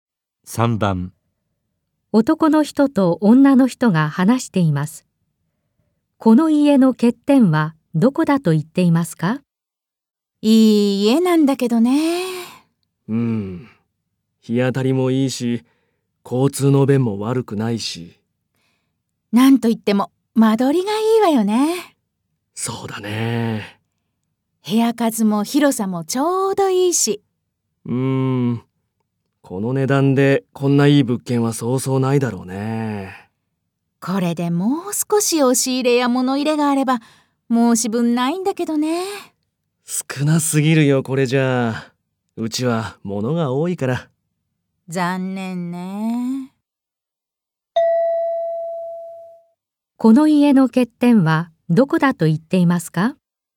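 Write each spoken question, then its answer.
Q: この家の欠点はどこだと言っていますか?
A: 押し入れや物入れが少ないこと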